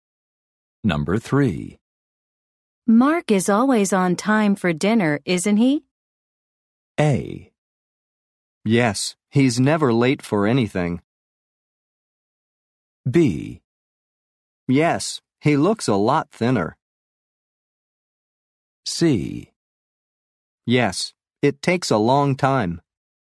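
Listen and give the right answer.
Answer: A: Yes, he's never late for anything.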